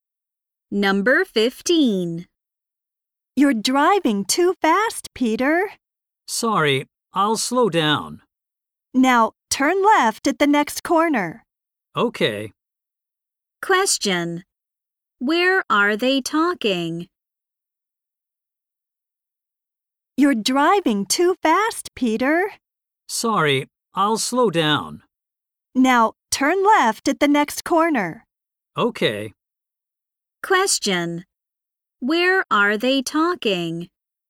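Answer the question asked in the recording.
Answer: In a car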